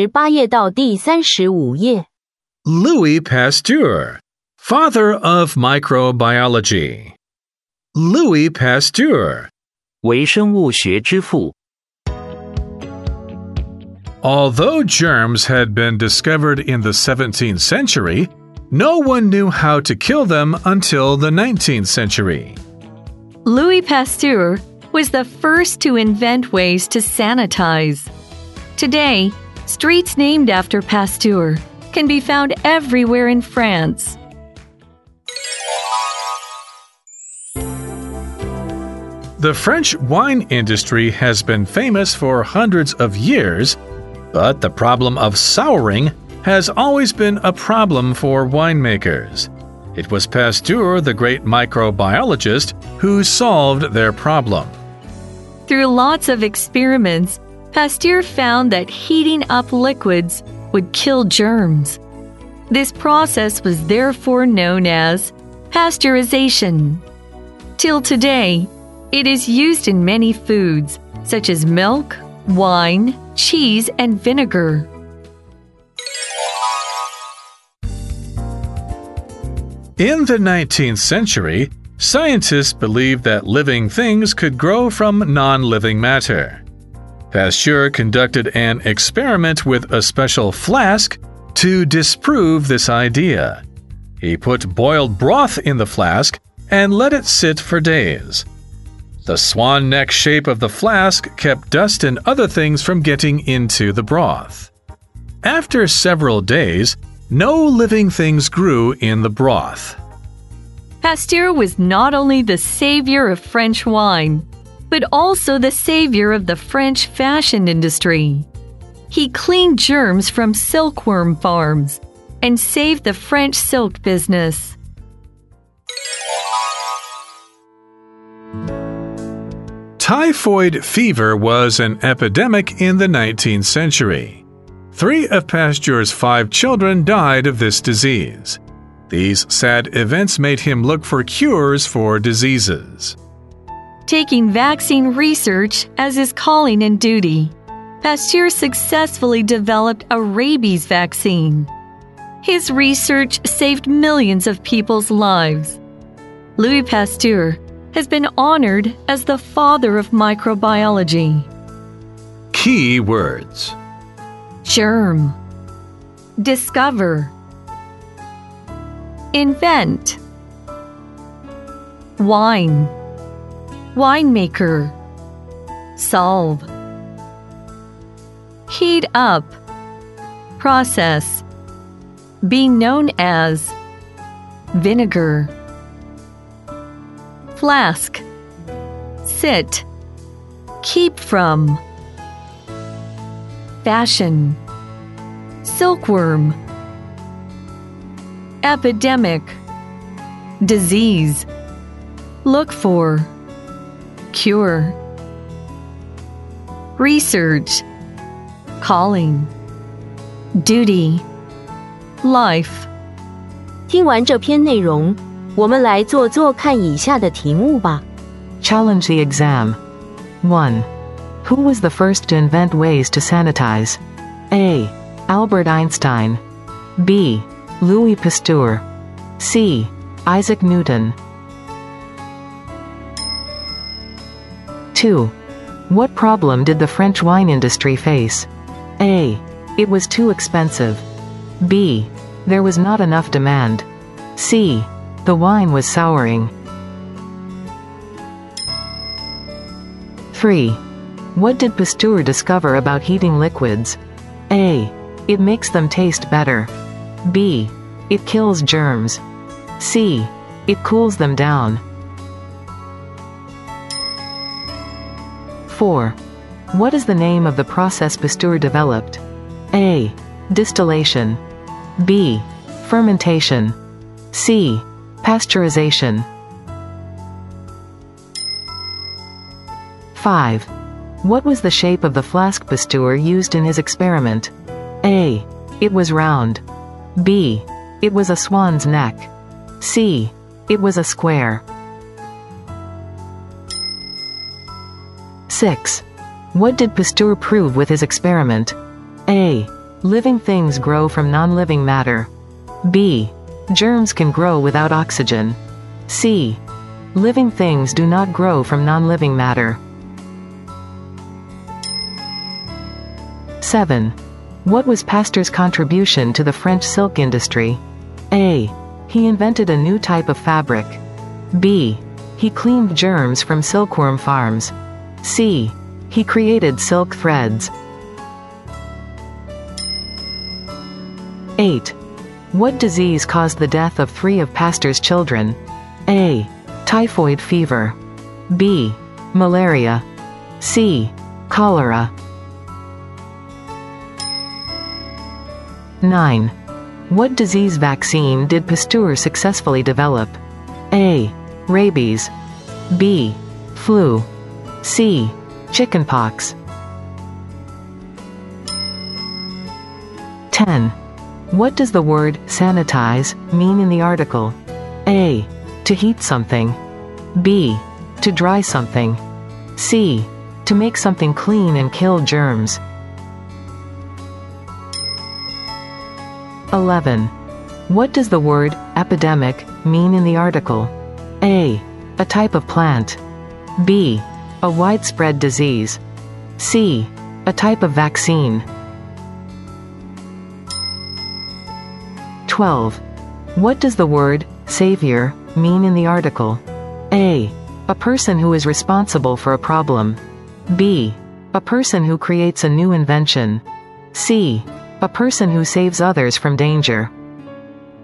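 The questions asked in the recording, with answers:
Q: Who was the first to invent ways to sanitize?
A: B: Louis Pasteur.

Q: What problem did the French wine industry face?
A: C: The wine was souring.

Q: What did Pasteur discover about heating liquids?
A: B: It kills germs.

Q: What is the name of the process Pasteur developed?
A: C: Pasteurization.

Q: What was the shape of the flask Pasteur used in his experiment?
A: B: It was a swan's neck.

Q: What did Pasteur prove with his experiment?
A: C: Living things do not grow from non-living matter.

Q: What was Pasteur's contribution to the French silk industry?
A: B: He cleaned germs from silkworm farms.

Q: What disease caused the death of 3 of Pasteur's children?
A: A: Typhoid fever.

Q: What disease vaccine did Pasteur successfully develop?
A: A: Rabies.

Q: What does the word sanitize mean in the article?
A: C: To make something clean and kill germs.

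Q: What does the word epidemic mean in the article?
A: B: A widespread disease.

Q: What does the word savior mean in the article?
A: C: A person who saves others from danger.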